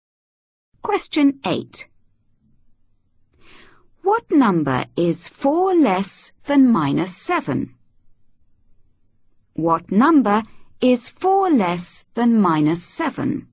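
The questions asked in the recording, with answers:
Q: What number is 4 less than minus 7?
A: -11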